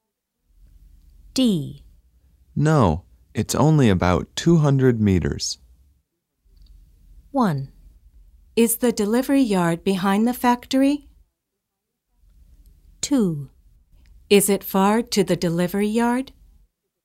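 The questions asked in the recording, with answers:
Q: No, it's only about 200 meters.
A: 2: Is it far to the delivery yard?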